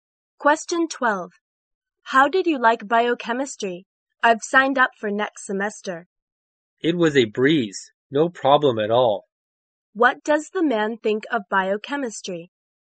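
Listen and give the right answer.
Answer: It was very easy.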